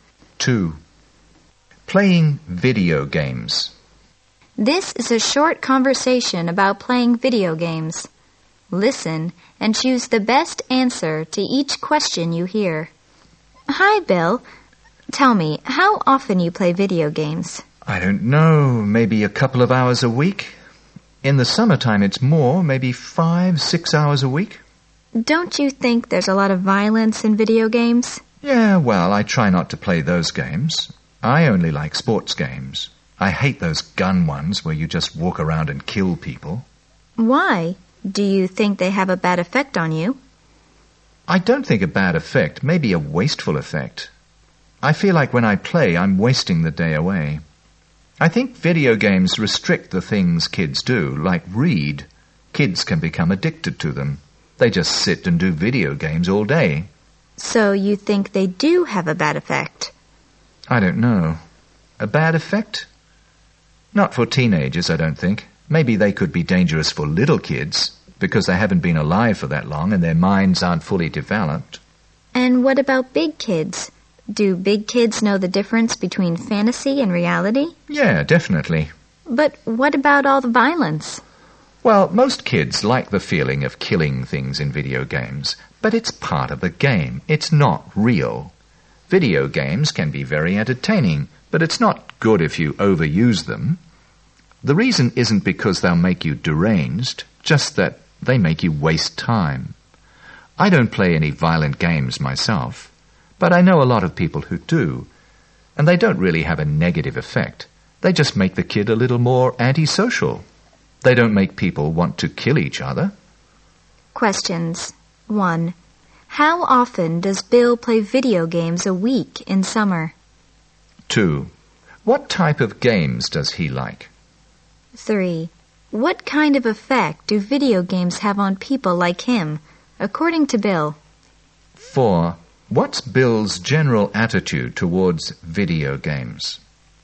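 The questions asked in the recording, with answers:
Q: How often does Bill play video games a week in summer?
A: 5-6 hours a week

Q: What type of games does he like?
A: Sports games

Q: What kind of effect do video games have on people like him, according to Bill?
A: A wasteful effect; they make him waste time

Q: What's Bill's general attitude towards video games?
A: They can be entertaining, but it's not good to overuse them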